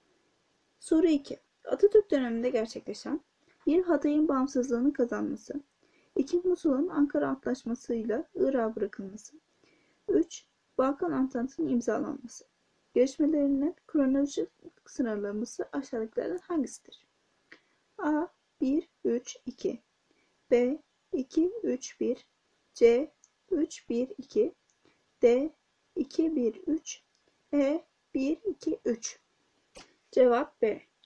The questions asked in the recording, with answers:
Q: Gelişmelerinin kronolojik sınırlaması aşağıdakilerden hangisidir?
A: Cevap B. 2, 3, 1